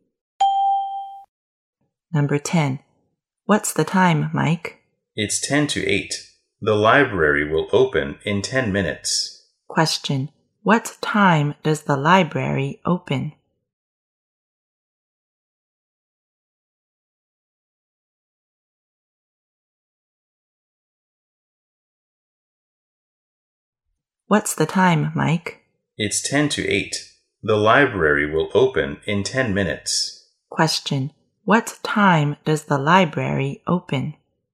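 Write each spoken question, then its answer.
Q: What time does the library open?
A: At 8:00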